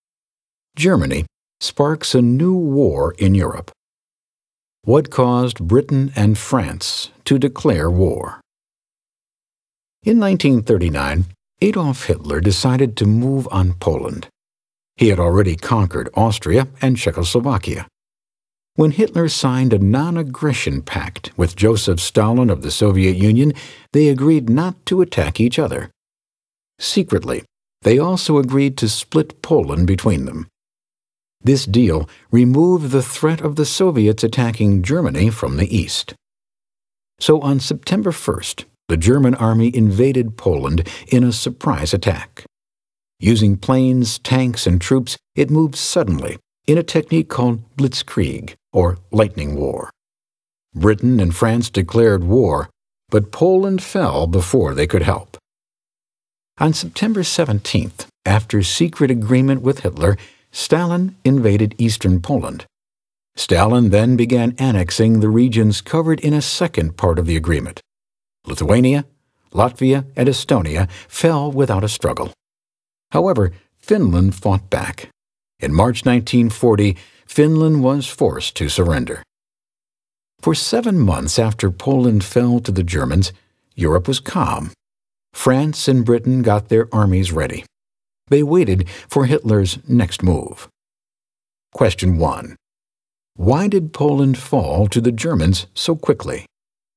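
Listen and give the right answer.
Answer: Germany attacked suddenly with planes, tanks and troops in a surprise Blitzkrieg (lightning war), and the Soviets invaded from the east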